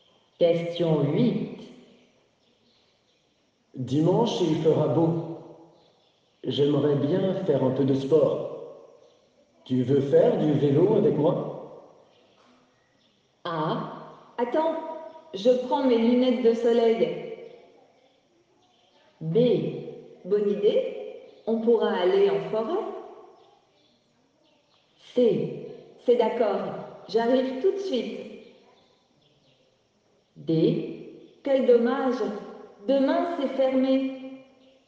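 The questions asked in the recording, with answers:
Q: Tu veux faire du vélo avec moi?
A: B: bonne idée, on pourra aller en forêt.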